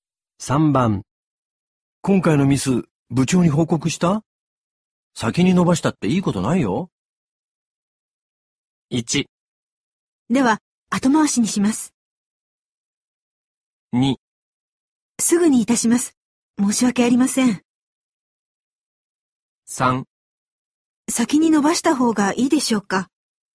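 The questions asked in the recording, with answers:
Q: 今回のミス、部長に報告した?先に伸ばしたっていいことないよ。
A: 2: すぐにいたします。申し訳ありません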